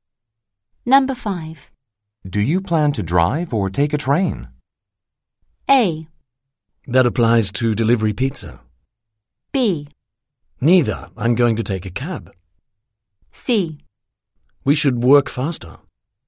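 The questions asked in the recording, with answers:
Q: Do you plan to drive or take a train?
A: B: Neither. I'm going to take a cab.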